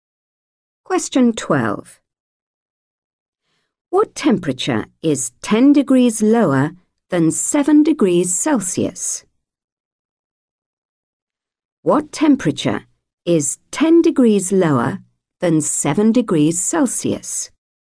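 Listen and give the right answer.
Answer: -3 degrees Celsius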